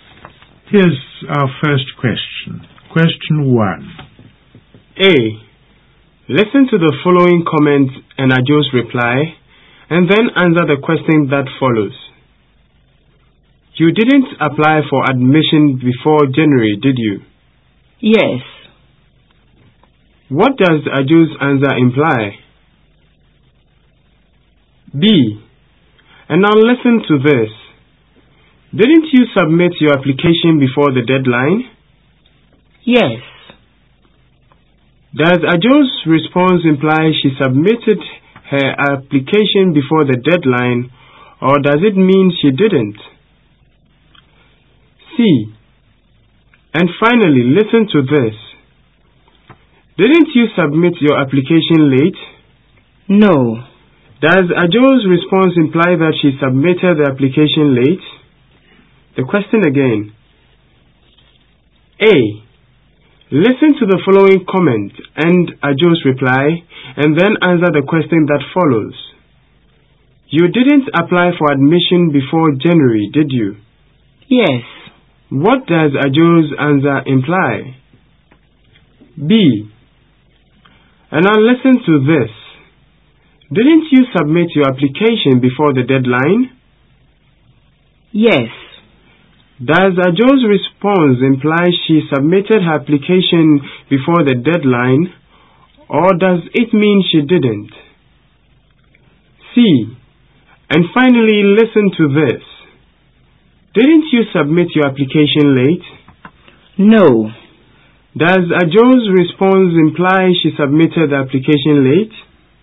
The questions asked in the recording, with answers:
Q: What does Ajo's answer imply?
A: My yes implies I applied for admission before January.

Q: Does Ajo's response imply she submitted her application before the deadline, or does it mean she didn't?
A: Here too, the response implies that I did submit the application before the deadline.

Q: Does Ajo's response imply that she submitted the application late?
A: My response, no, implies that I did not submit my application late.